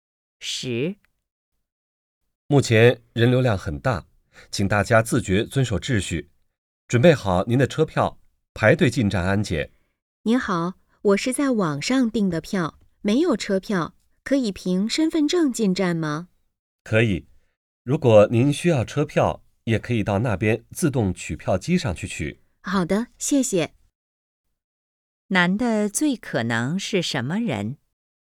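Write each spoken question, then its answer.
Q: 男的最可能是什么人?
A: 乘客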